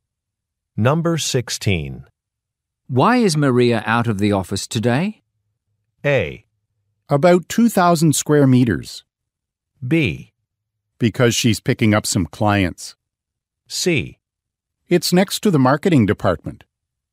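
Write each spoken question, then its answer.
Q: Why is Maria out of the office today?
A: B: Because she's picking up some clients.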